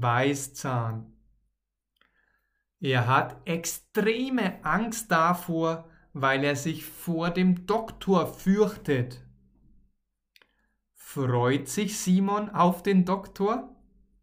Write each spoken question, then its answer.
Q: Freut sich Simon auf den Doktor?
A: Nein, Er hat extreme Angst.